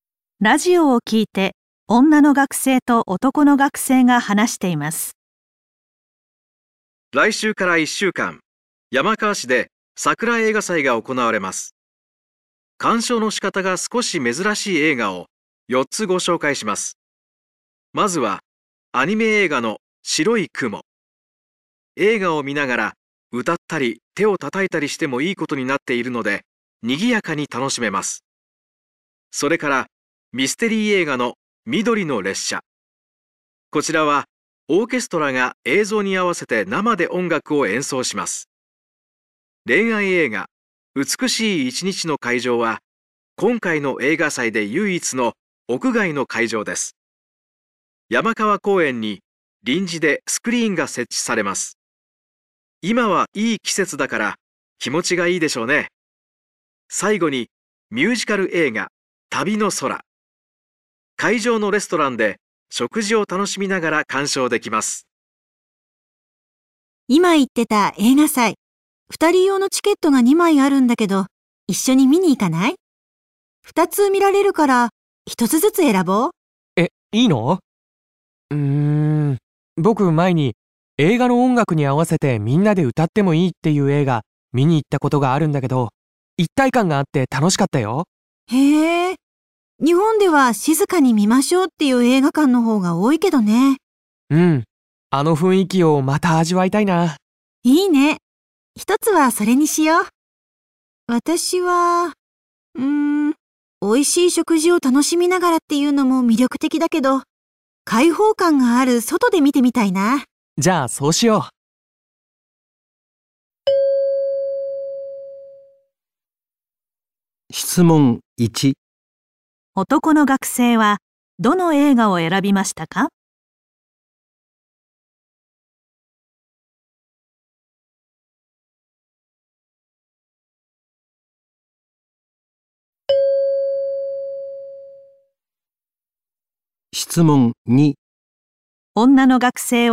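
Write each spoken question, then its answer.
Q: 男の学生はどの映画を選びましたか?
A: 白い雲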